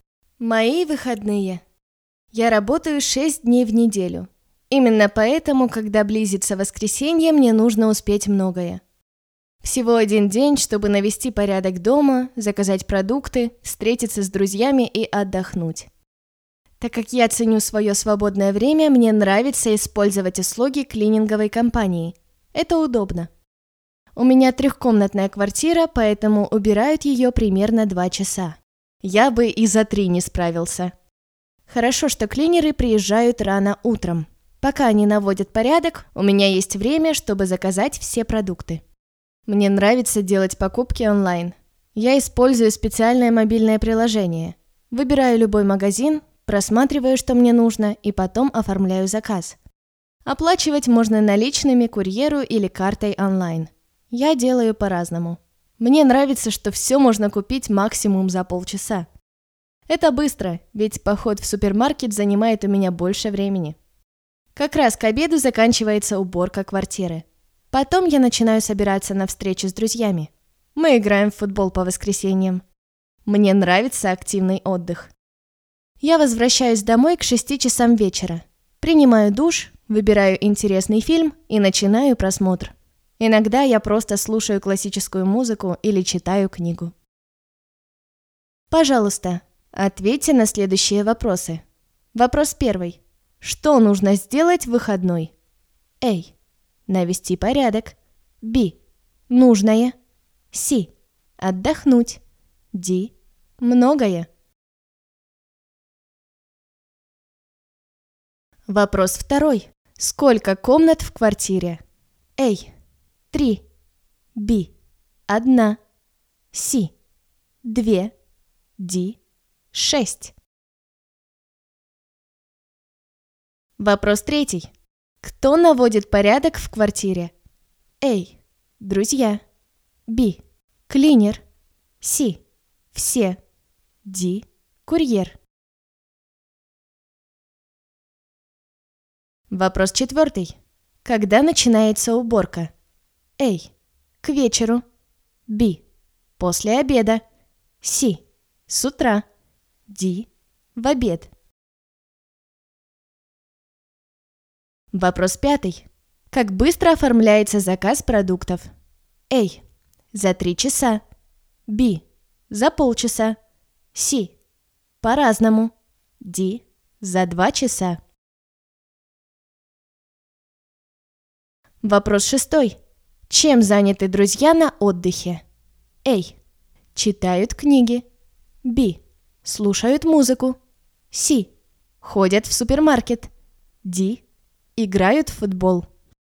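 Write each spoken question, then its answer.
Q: Сколько комнат в квартире?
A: A: 3

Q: Кто наводит порядок в квартире?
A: Б: Клинер

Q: Когда начинается уборка?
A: C: С утра

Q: Как быстро оформляется заказ продуктов?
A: B: За полчаса

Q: Чем заняты друзья на отдыхе?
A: D: Играют в футбол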